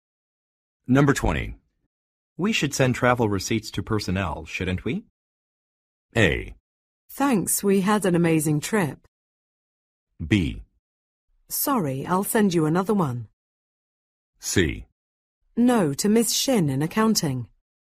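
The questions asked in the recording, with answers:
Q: We should send travel receipts to personnel, shouldn't we?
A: C: No, to Miss Shin in accounting.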